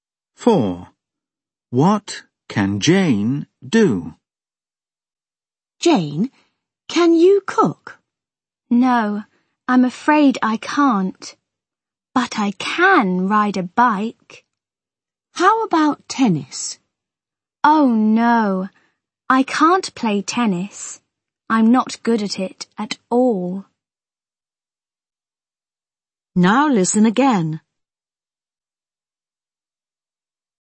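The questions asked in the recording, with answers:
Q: What can Jane do?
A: She can ride a bike.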